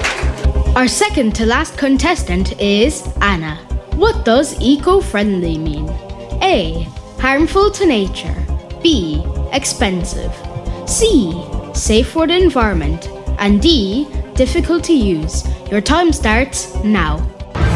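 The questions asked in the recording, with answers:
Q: What does eco-friendly mean?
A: C: Safe for the environment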